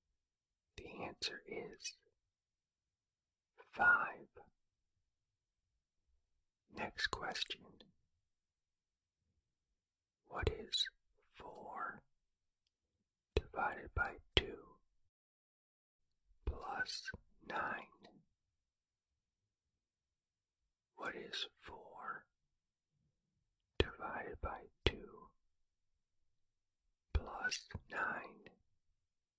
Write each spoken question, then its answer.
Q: What is 4 divided by 2 plus 9?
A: The answer is 11.